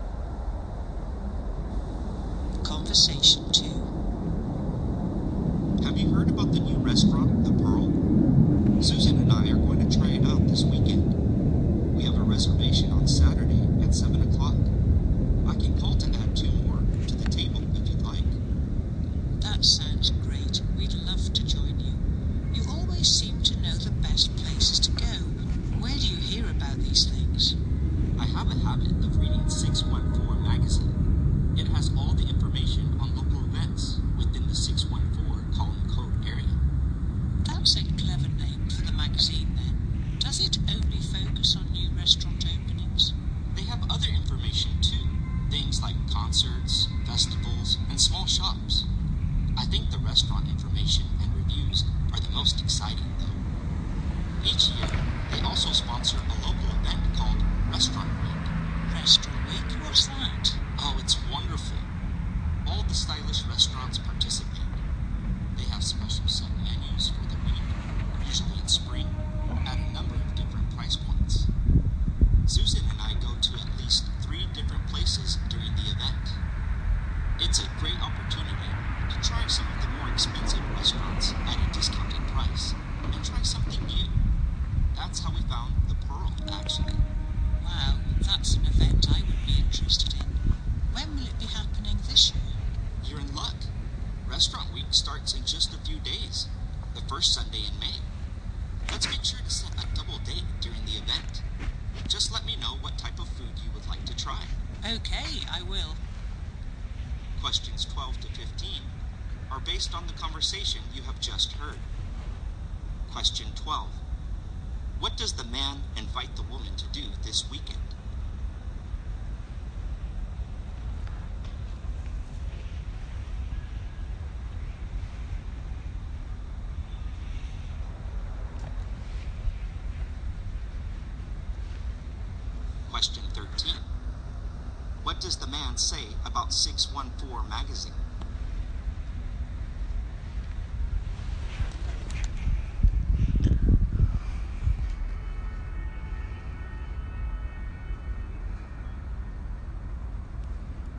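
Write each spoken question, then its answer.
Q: What does the man invite the woman to do this weekend?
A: Join him and Susan for dinner at the new restaurant, The Pearl.

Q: What does the man say about 614 magazine?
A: It has information on local events in the 614 area code.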